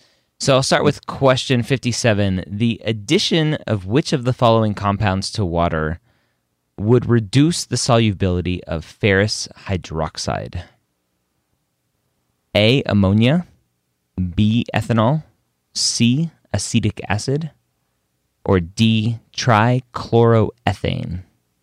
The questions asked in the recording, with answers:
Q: The addition of which of the following compounds to water would reduce the solubility of ferrous hydroxide?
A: And that very first one there, ammonia, classic example of a weak base, the MCAT.